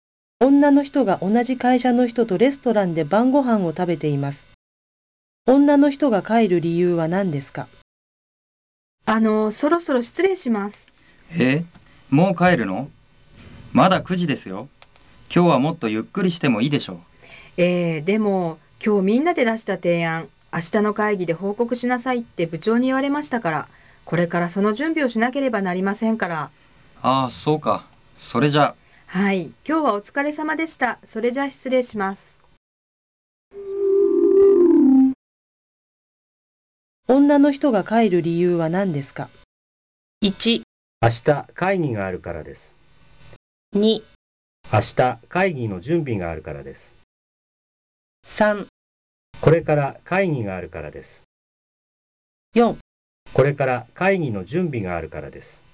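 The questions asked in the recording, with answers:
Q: 女の人が帰る理由は何ですか?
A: 4: これから会議の準備があるからです。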